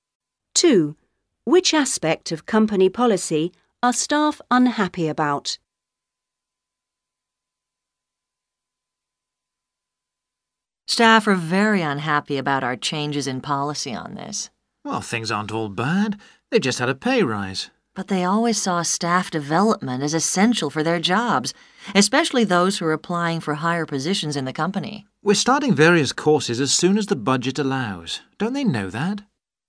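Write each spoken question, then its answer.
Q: Which aspect of company policy are staff unhappy about?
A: staff development (training courses)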